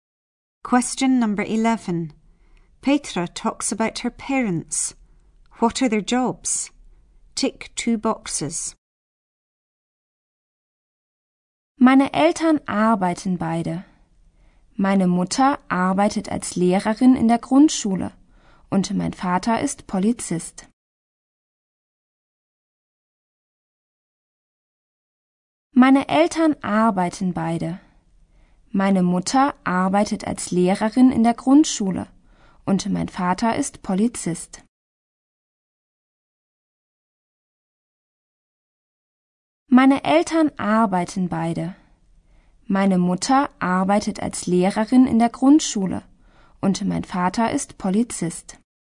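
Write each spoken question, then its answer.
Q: What are their jobs? Tick 2 boxes.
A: Mother is a primary school teacher, father is a police officer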